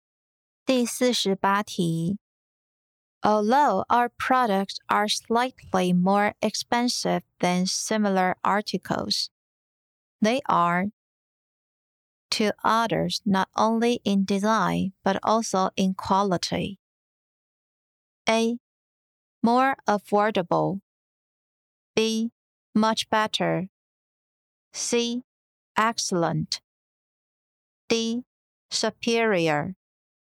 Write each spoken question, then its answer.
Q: Although our products are slightly more expensive than similar articles, they are to others not only in design but also in quality.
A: 正确答案为 D. Superior.